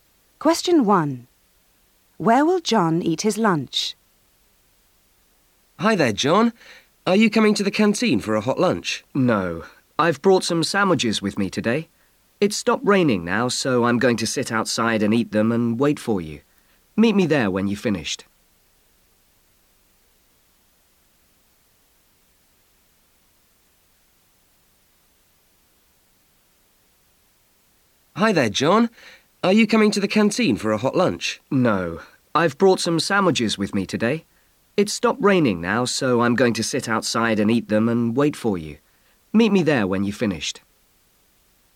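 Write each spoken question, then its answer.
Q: Where will John eat his lunch?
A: Outside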